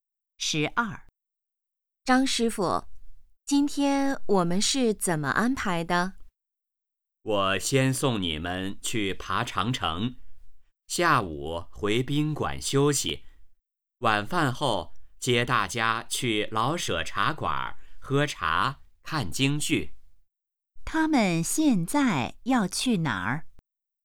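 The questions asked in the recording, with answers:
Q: 他们现在要去哪儿?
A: 长城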